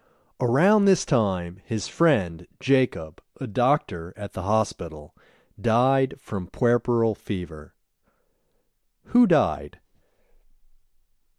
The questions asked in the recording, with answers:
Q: Who died?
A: His friend, Jacob, died.